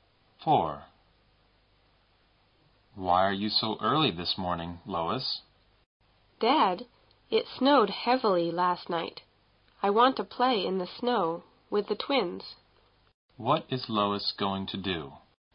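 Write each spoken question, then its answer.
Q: What is Lois going to do?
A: Play in the snow with the twins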